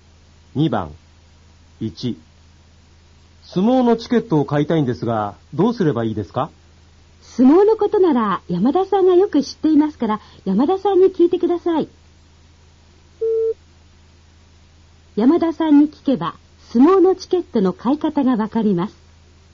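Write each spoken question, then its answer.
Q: 山田さんに聞けば相撲のチケットの買い方がわかります。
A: 正しい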